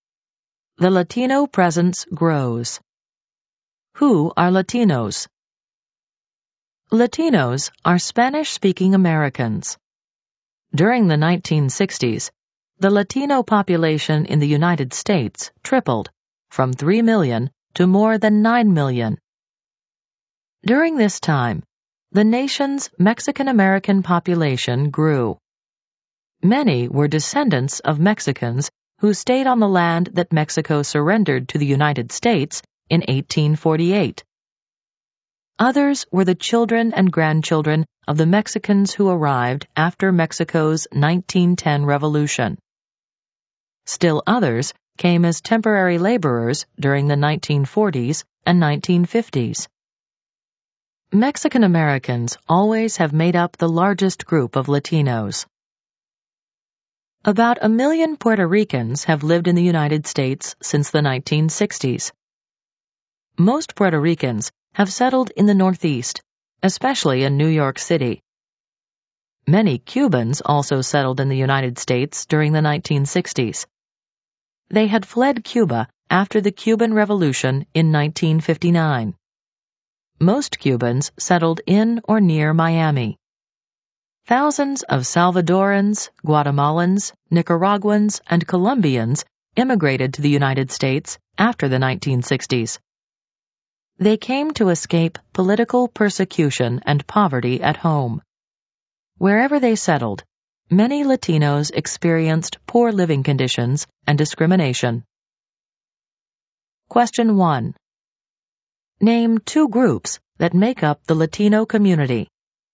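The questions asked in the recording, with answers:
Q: Name two groups that make up the Latino community.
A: Mexican Americans and Puerto Ricans (also Cubans, Salvadorans, Guatemalans, Nicaraguans, Colombians)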